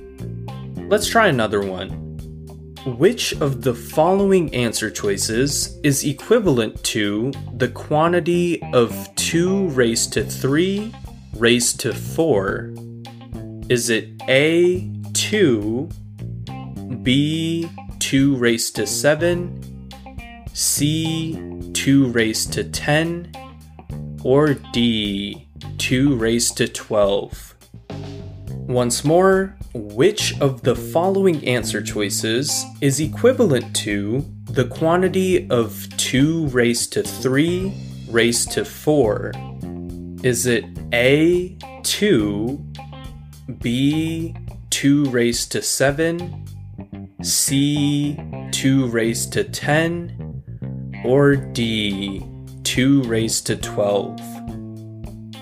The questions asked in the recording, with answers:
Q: Which of the following answer choices is equivalent to the quantity of 2 raised to 3 raised to 4?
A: So as 3 times 4 is equal to 12, we know that answer choice D, 2 raised to 12, is the right answer.